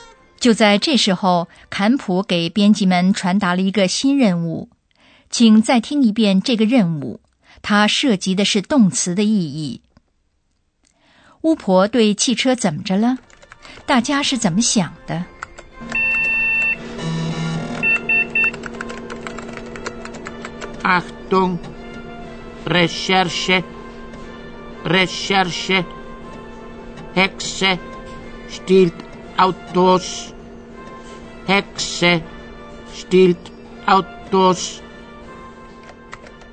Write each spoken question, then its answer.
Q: 巫婆对汽车怎么着了?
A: 有人利用狂欢节化妆的机会 stehlen 偷汽车。